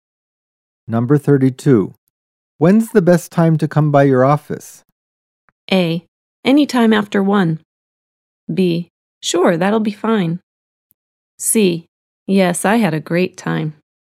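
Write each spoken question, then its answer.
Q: When's the best time to come by your office?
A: A: Any time after 1.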